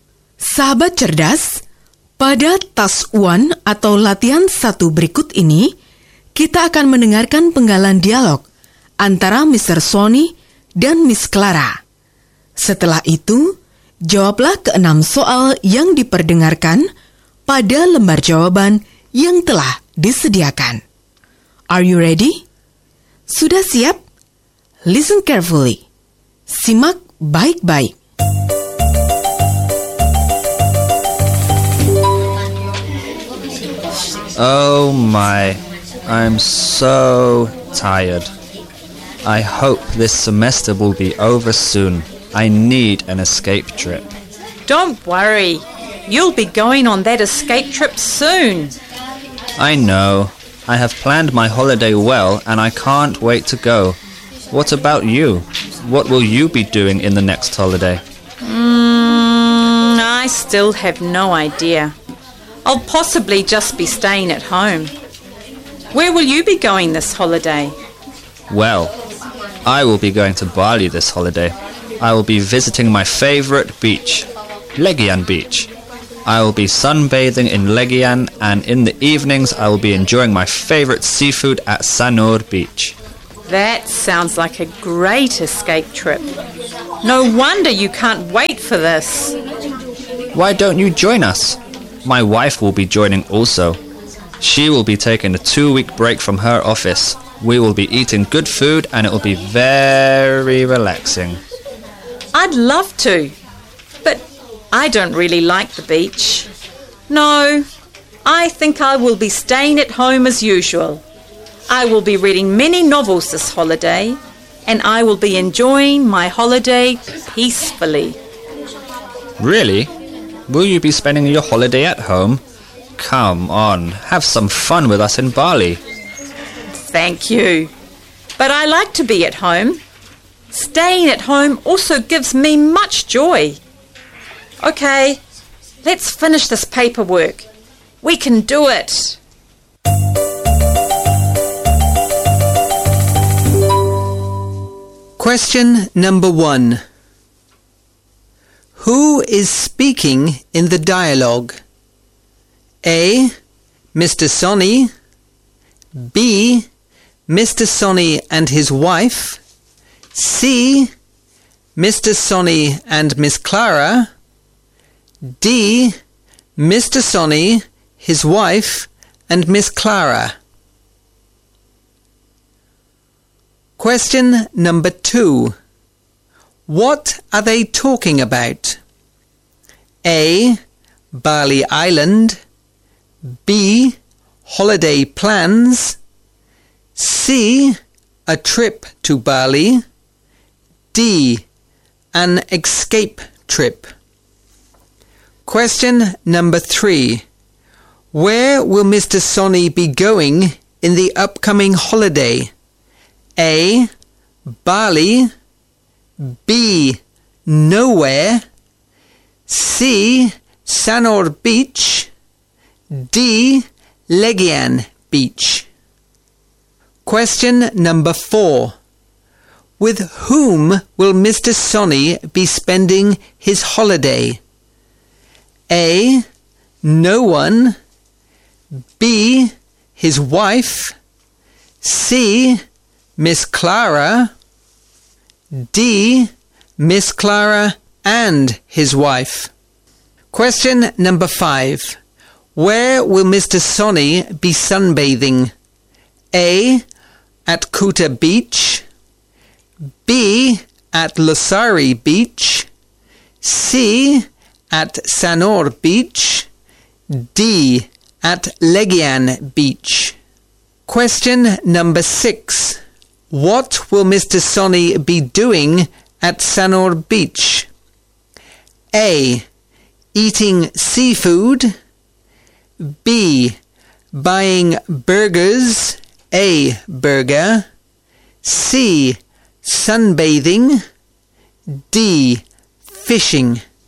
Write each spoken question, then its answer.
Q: Who is speaking in the dialogue?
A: C. Mr. Sonny and Miss Clara.

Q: What are they talking about?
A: B. Holiday plans.

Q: Where will Mr. Sonny be going in the upcoming holiday?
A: A. Bali.

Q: With whom will Mr. Sonny be spending his holiday?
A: B. His wife.

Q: Where will Mr. Sonny be sunbathing?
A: D. Legian Beach.

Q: What will Mr. Sonny be doing at Sanur Beach?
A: A. Eating seafood.